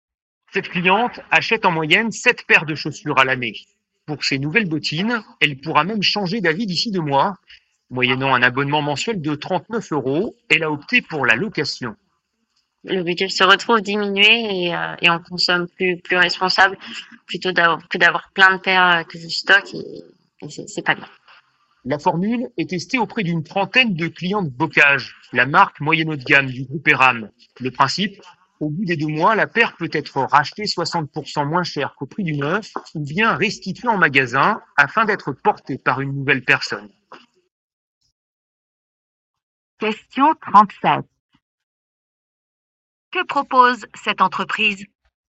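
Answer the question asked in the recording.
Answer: La location de chaussures avec un abonnement mensuel, puis le rachat de la paire ou son retour au bout de 2 mois.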